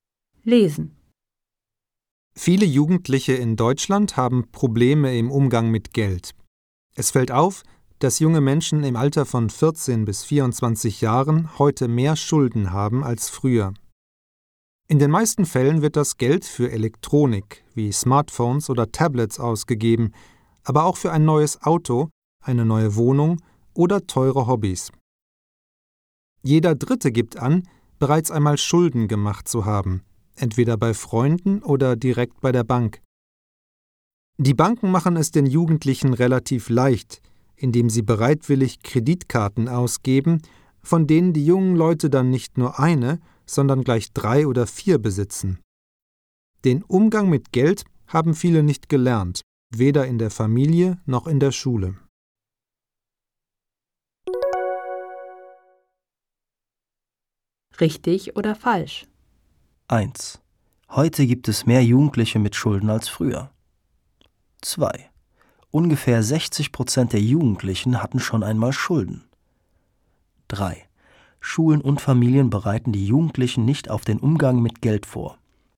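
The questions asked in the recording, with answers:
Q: Heute gibt es mehr Jugendliche mit Schulden als früher.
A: Richtig

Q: Ungefähr 60% der Jugendlichen hatten schon einmal Schulden.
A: Falsch

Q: Schulen und Familien bereiten die Jugendlichen nicht auf den Umgang mit Geld vor.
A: Richtig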